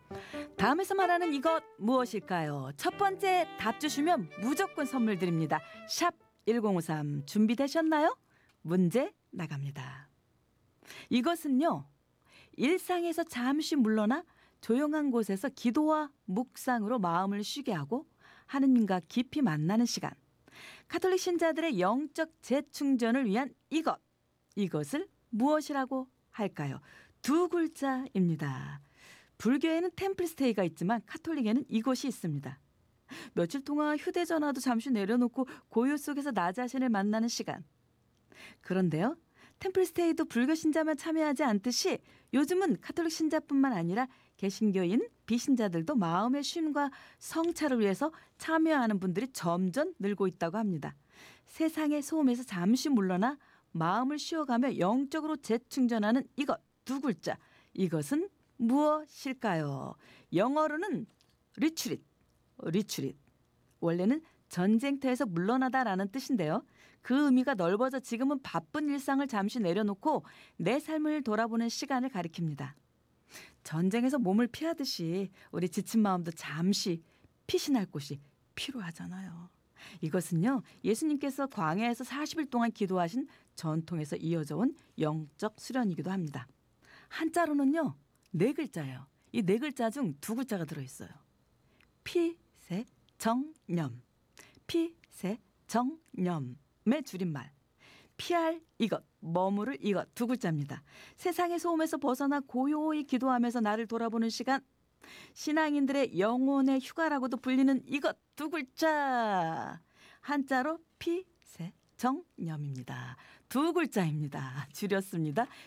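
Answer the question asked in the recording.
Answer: 피정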